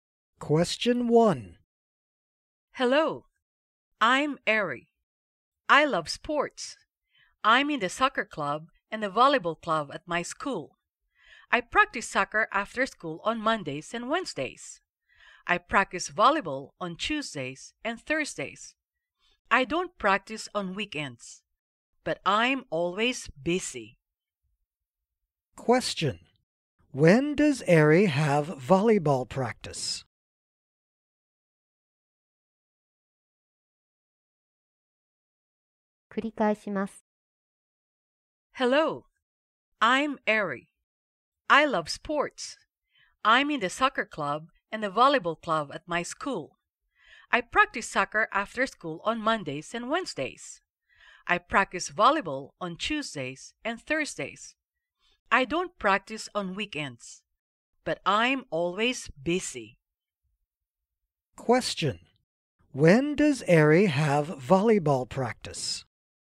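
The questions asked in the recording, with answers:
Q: When does Ari have volleyball practice?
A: On Tuesdays and Thursdays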